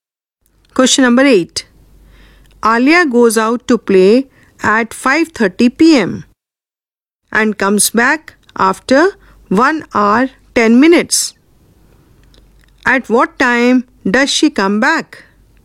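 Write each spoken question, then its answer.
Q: At what time does she come back?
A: 6:40 p.m.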